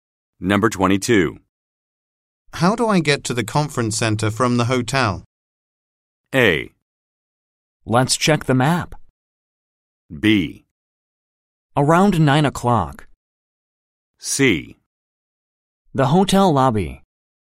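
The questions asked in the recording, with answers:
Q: How do I get to the conference center from the hotel?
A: A: Let's check the map.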